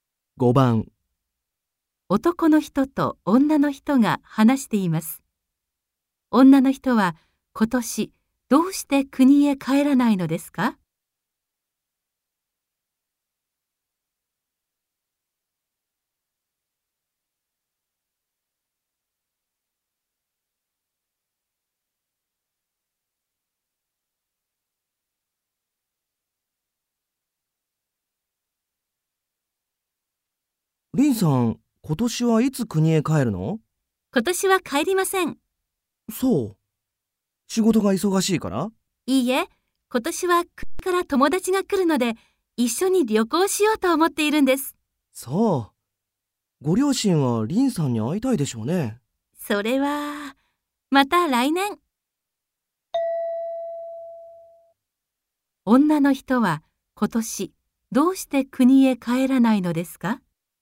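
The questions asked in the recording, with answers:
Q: 女の人は今年どうして国へ帰らないのですか?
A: 国から友達が来て、一緒に旅行するから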